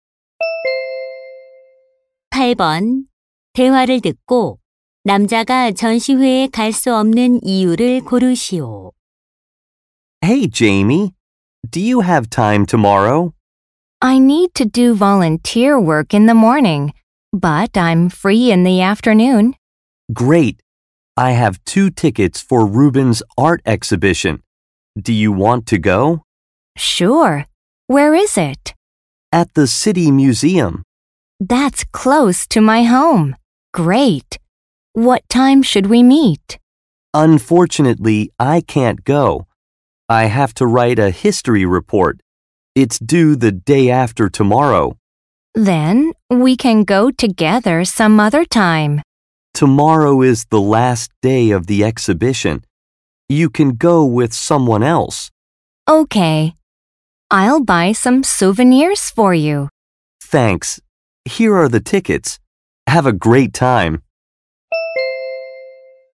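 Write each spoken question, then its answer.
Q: 대화를 듣고 남자가 전시회에 갈 수 없는 이유를 고르시오.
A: 역사 보고서를 써야 해서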